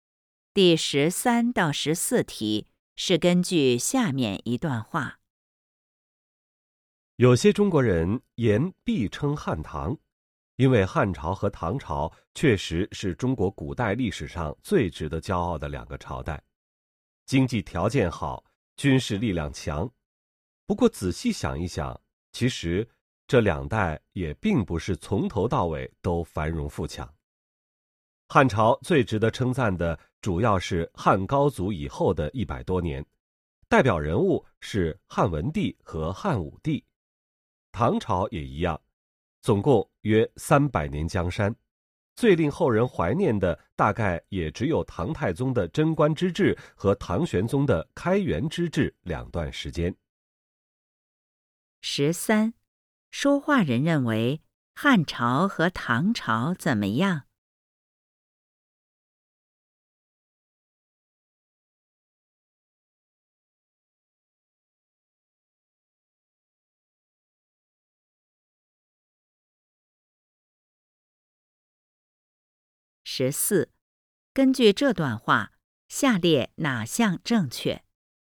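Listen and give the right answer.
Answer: 并不是从头到尾都繁荣富强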